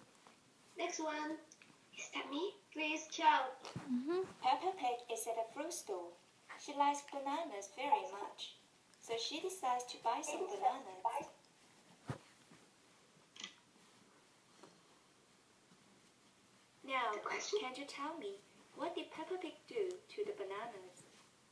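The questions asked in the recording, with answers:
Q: Now, can you tell me, what did Peppa Pig do to the bananas?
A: She bought some bananas.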